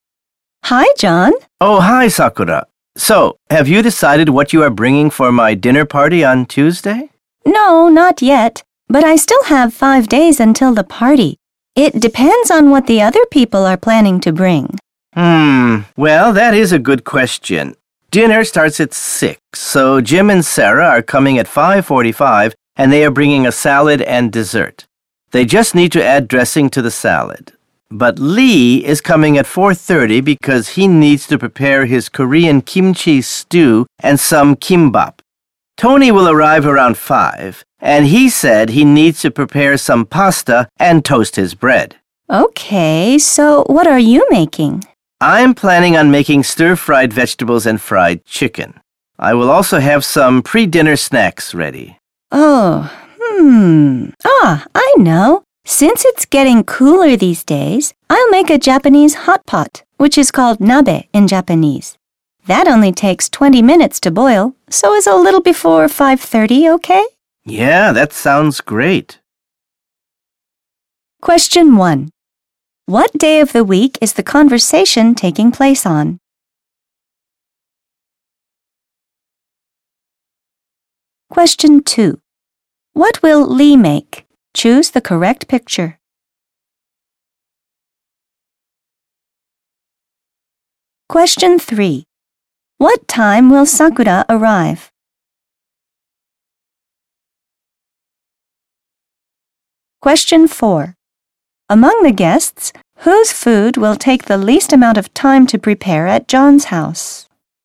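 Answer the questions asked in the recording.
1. Thursday
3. A little before 5:30
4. Jim and Sarah's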